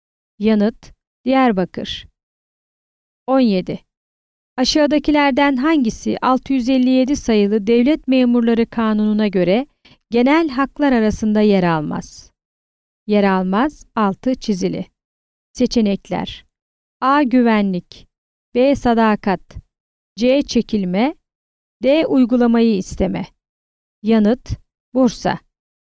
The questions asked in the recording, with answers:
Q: Aşağıdakilerden hangisi 657 sayılı Devlet Memurları Kanunu'na göre genel haklar arasında yer almaz?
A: Yanıt: Bursa.